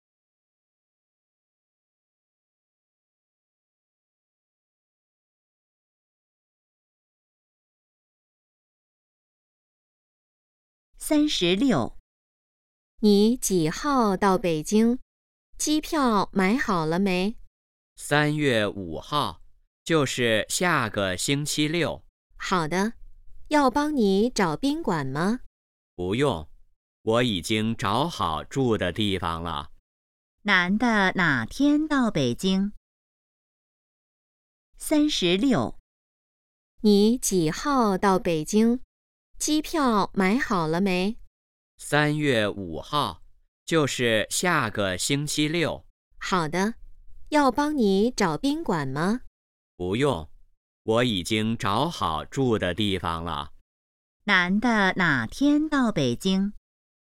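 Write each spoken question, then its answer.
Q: 男的哪天到北京?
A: 3月5号(下个星期六)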